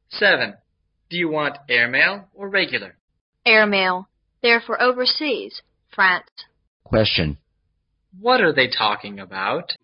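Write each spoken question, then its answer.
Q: What are they talking about?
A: Sending letters to France by airmail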